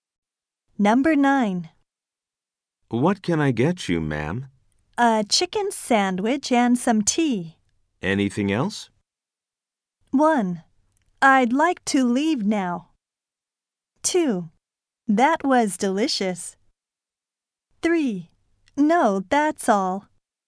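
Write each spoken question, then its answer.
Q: Anything else?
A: 3: No, that's all.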